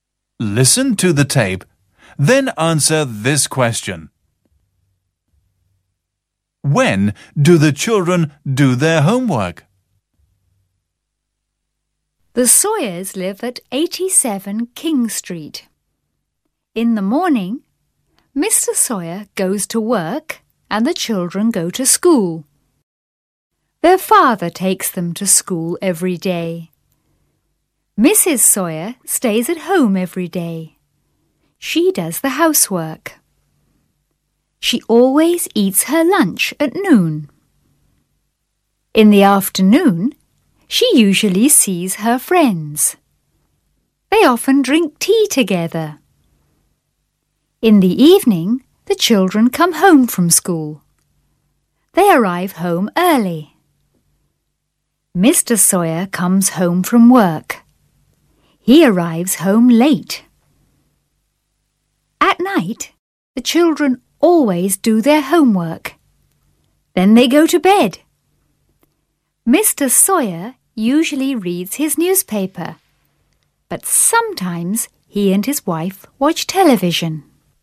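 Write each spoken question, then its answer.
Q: When do the children do their homework?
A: At night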